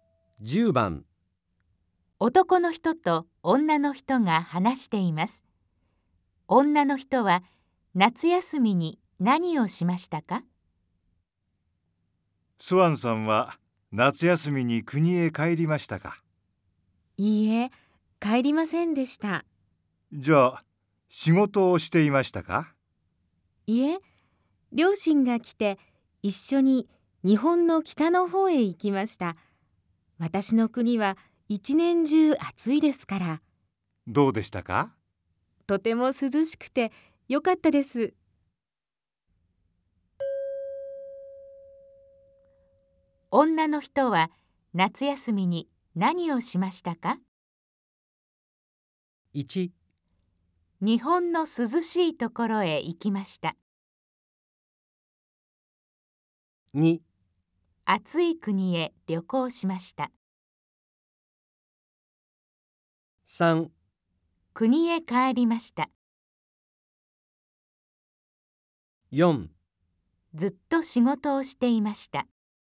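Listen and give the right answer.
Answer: 1: 日本の涼しいところへ行きました。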